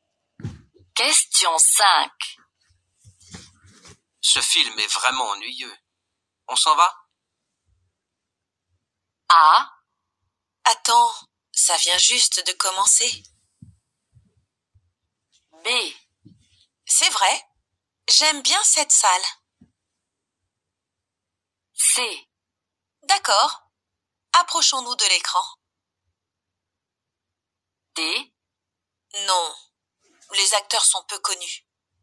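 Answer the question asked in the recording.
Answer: A: Attends, ça vient juste de commencer.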